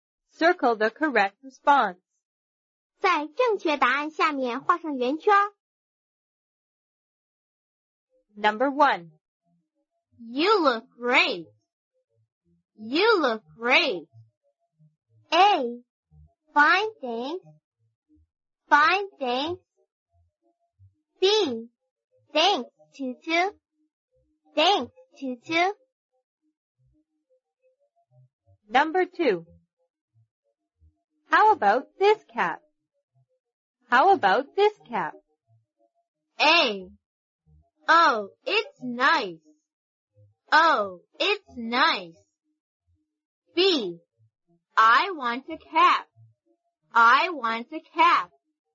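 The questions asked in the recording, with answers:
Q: You look great.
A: B: Thanks, Tutu.

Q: How about this cap?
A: A: Oh, it's nice.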